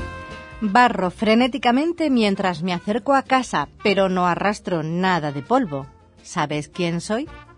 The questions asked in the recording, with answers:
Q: ¿Sabes quién soy?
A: Solución, un jugador de curling.